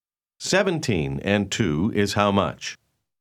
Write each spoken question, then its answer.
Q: 17 and 2 is how much?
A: 19.